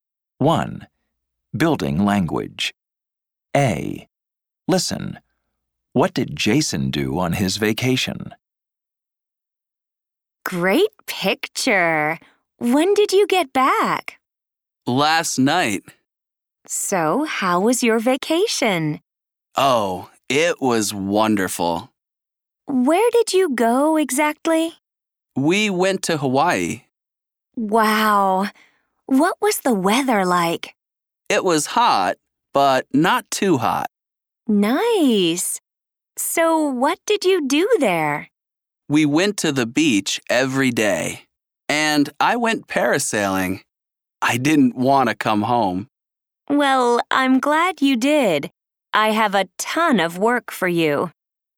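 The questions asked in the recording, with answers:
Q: What did Jason do on his vacation?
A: He went to Hawaii, went to the beach every day, and went parasailing.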